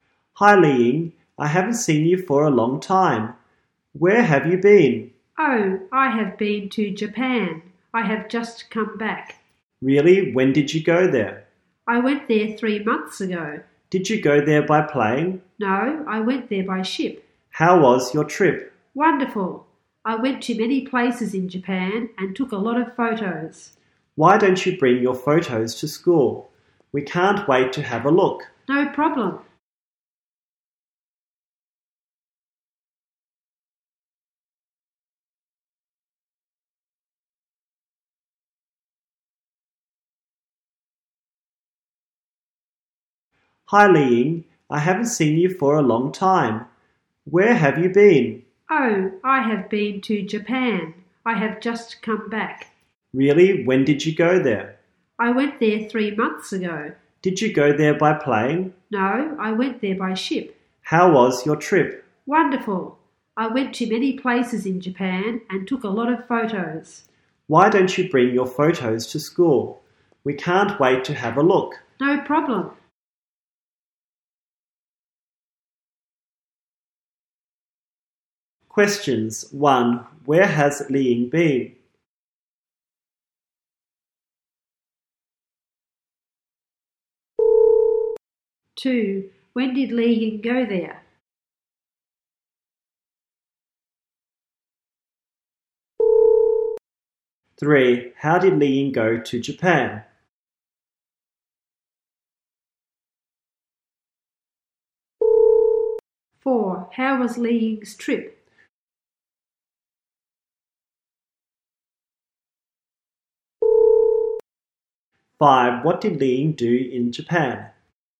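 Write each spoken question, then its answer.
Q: Where has Li Ying been?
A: Japan

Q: When did Li Ying go there?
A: 3 months ago

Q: How did Li Ying go to Japan?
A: By ship

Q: How was Li Ying's trip?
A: Wonderful

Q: What did Li Ying do in Japan?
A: Went to many places and took a lot of photos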